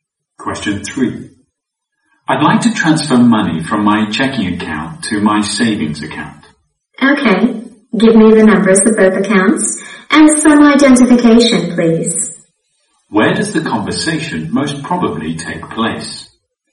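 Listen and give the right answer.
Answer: In a bank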